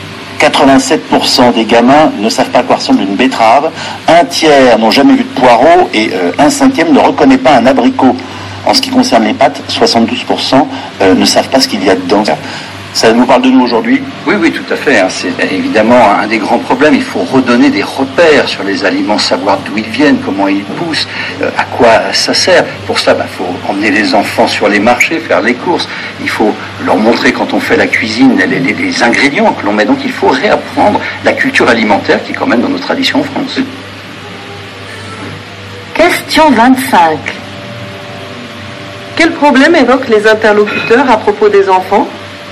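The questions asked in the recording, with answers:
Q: Quel problème évoquent les interlocuteurs à propos des enfants?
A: Ils ne connaissent pas les aliments (ils ne savent pas à quoi ils ressemblent ni d'où ils viennent).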